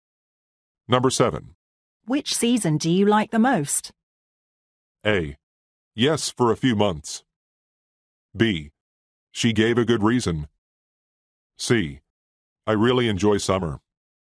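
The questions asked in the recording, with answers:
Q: Which season do you like the most?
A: C: I really enjoy summer.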